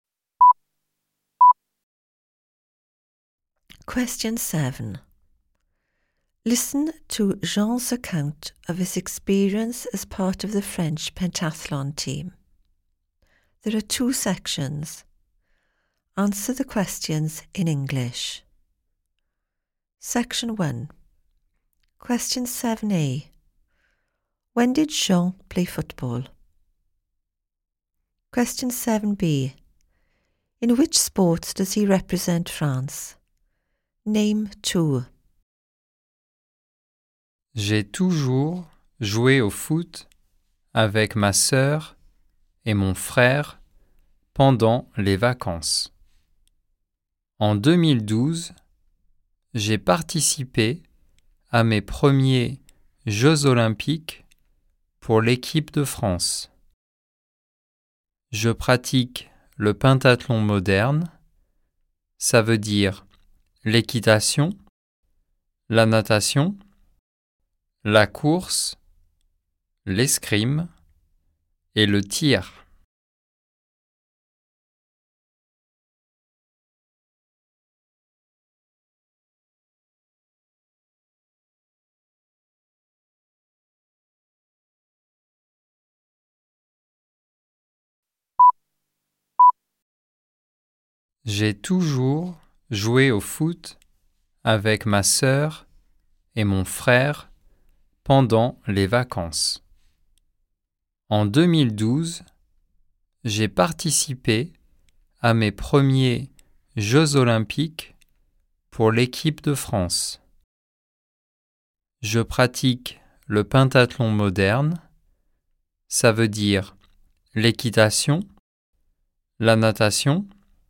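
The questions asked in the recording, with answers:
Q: When did Jean play football?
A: During the holidays

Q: In which sport does he represent France?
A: Modern pentathlon: riding, swimming, running, fencing, shooting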